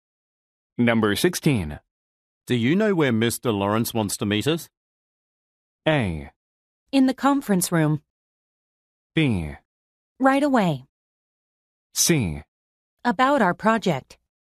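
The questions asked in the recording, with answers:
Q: Do you know where Mr. Lawrence wants to meet us?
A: A: In the conference room.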